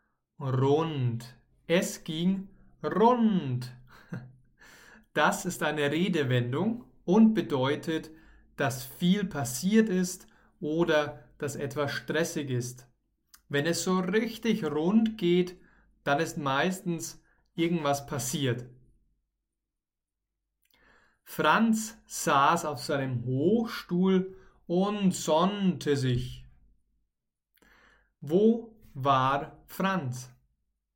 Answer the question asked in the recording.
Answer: Auf seinem Hochstuhl. Franz war auf seinem Hochstuhl.